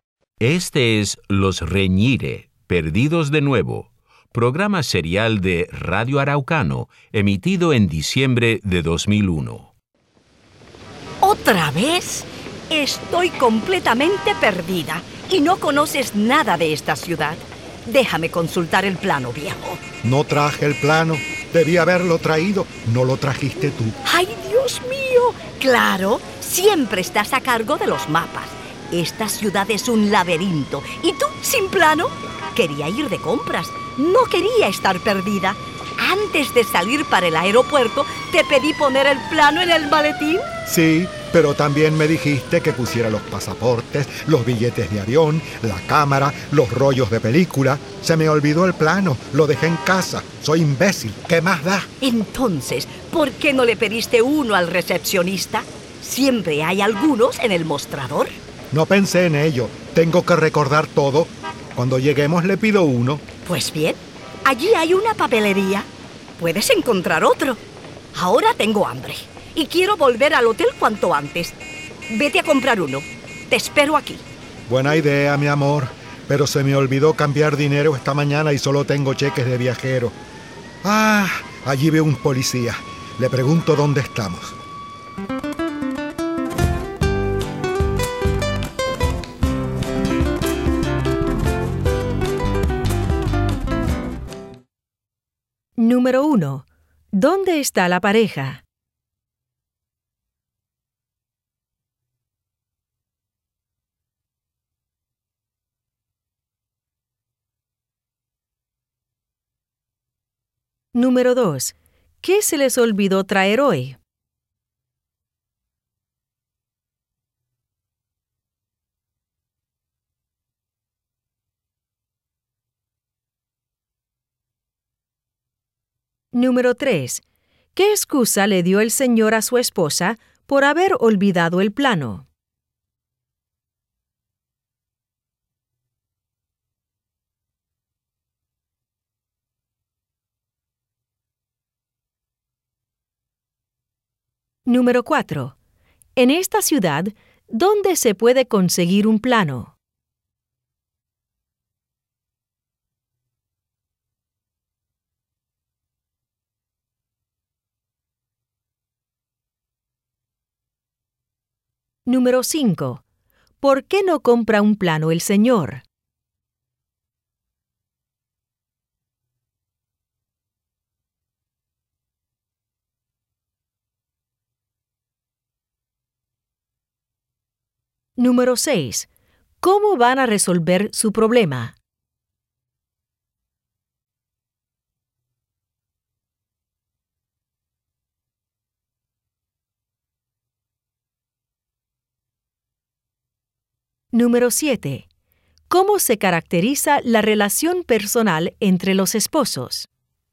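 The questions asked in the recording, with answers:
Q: ¿Dónde está la pareja?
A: Perdidos en una ciudad que no conocen

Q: ¿Qué se les olvidó traer hoy?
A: El plano de la ciudad

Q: ¿Qué excusa le dio el señor a su esposa por haber olvidado el plano?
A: Ella le pidió llevar muchas otras cosas (pasaportes, billetes, cámara, rollos)

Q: En esta ciudad, ¿dónde se puede conseguir un plano?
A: En el mostrador del hotel (recepción) o en una papelería

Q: ¿Por qué no compra un plano el señor?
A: No cambió dinero y solo tiene cheques de viajero

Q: ¿Cómo van a resolver su problema?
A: Preguntándole a un policía dónde están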